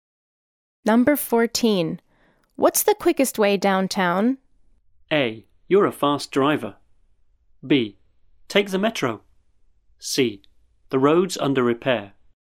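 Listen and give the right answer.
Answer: B: Take the metro.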